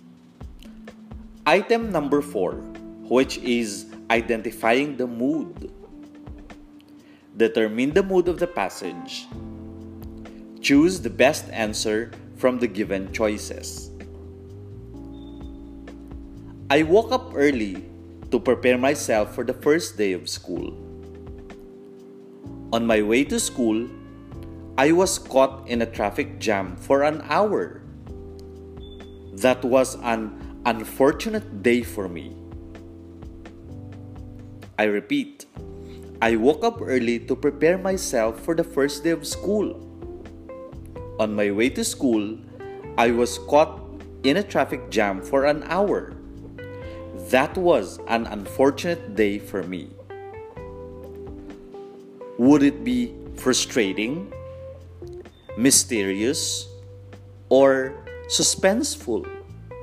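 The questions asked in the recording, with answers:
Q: Would it be frustrating, mysterious, or suspenseful?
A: frustrating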